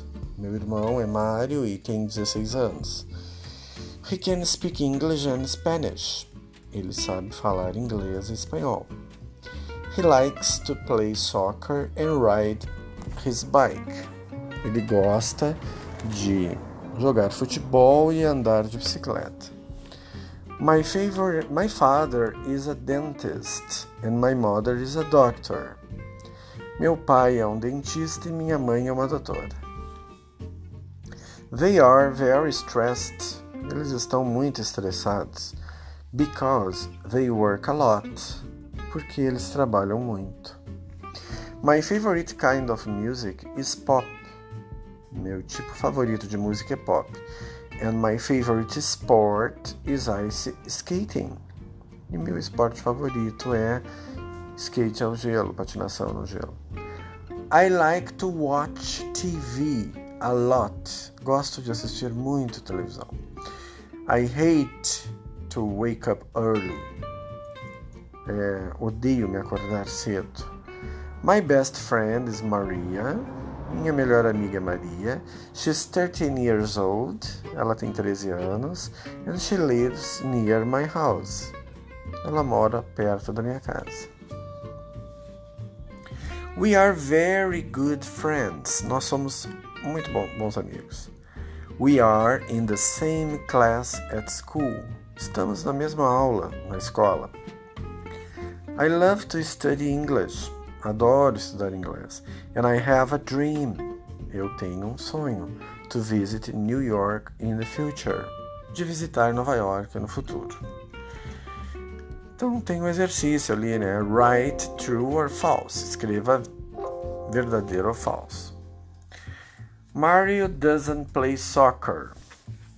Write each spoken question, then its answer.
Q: Mario doesn't play soccer.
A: Ah, então é falso, né? Porque ele gosta de jogar futebol.